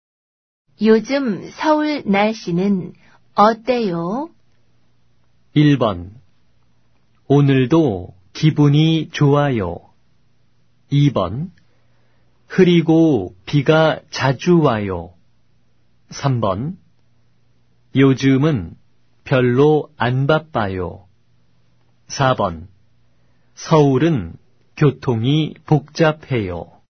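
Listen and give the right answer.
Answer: 2: 흐리고 비가 자주 와요.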